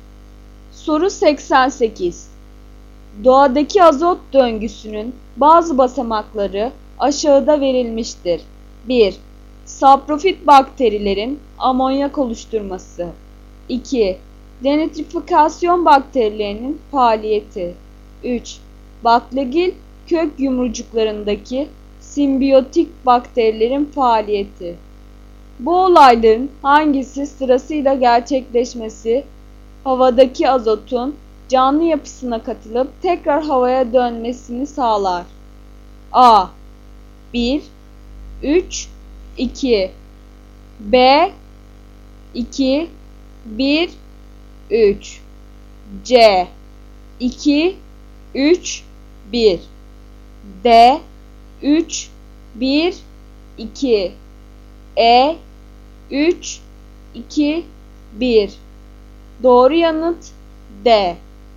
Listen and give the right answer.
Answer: Doğru yanıt D.